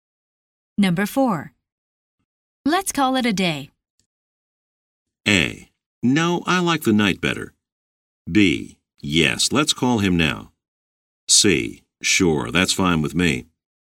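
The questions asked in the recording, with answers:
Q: Let's call it a day.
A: C: Sure, that's fine with me.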